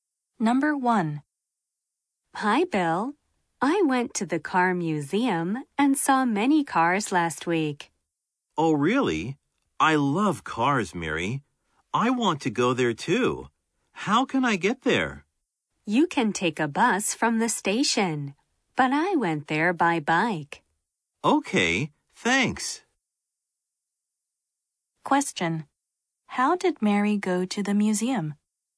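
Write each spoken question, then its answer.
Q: How did Mary go to the museum?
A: By bike.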